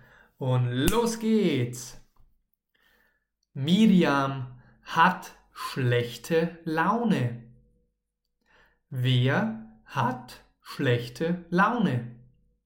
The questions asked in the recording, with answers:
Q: Wer hat schlechte Laune?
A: Miriam, genau. Miriam hat schlechte Laune.